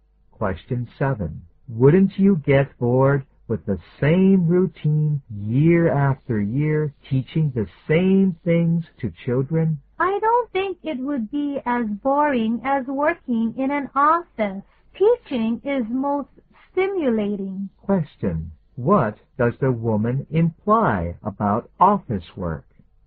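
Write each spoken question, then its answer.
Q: What does the woman imply about office work?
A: Office work is more boring than teaching.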